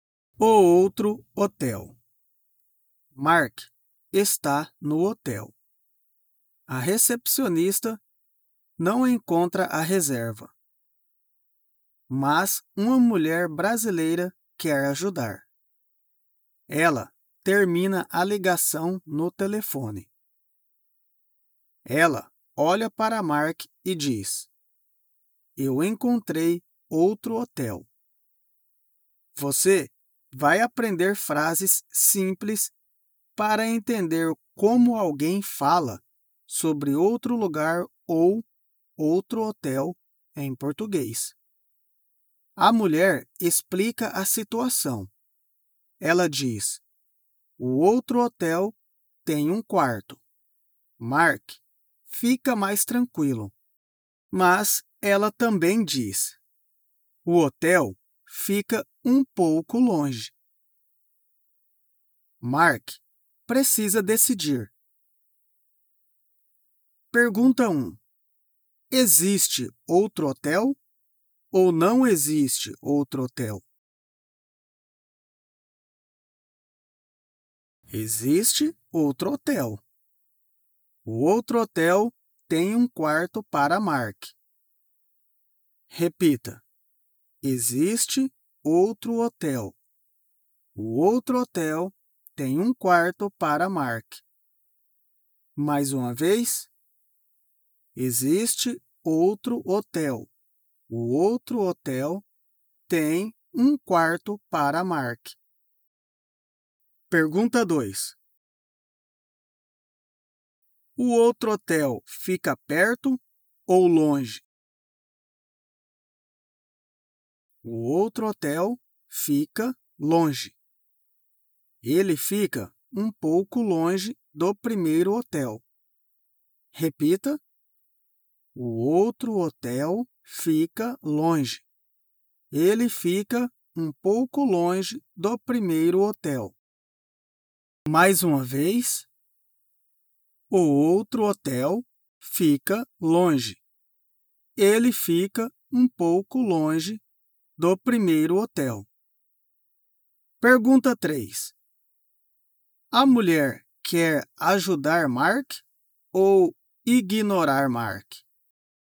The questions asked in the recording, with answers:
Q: Existe outro hotel ou não existe outro hotel?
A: Existe outro hotel. O outro hotel tem um quarto para Mark.

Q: O outro hotel fica perto ou longe?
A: O outro hotel fica longe.